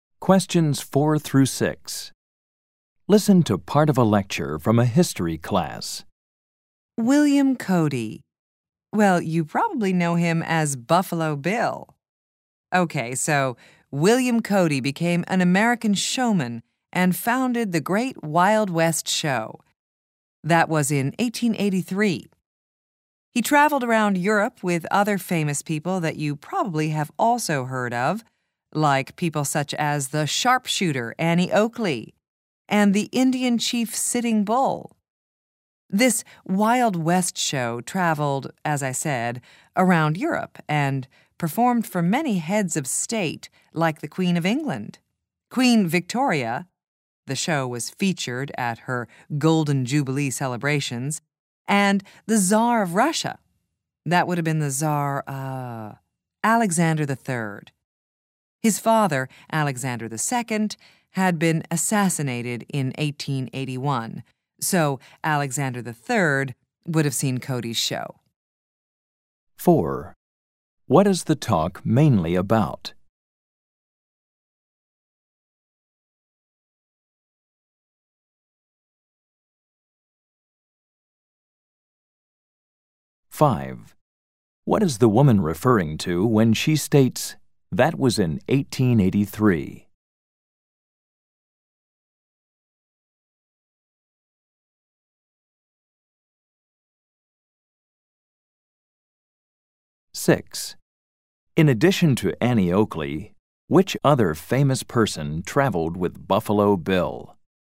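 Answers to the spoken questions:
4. William Cody (Buffalo Bill) and his Wild West Show
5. The year William Cody founded the Great Wild West Show
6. The Indian chief Sitting Bull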